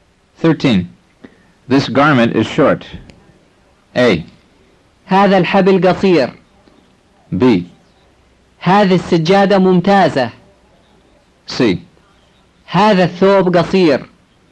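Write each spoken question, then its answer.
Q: This garment is short.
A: C: هذا الثوب قصير.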